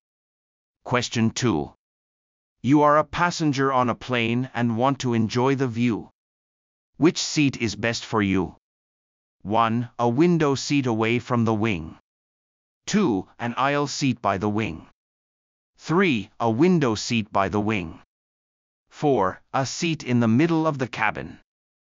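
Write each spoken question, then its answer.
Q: Which seat is best for you?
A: 1: A window seat away from the wing.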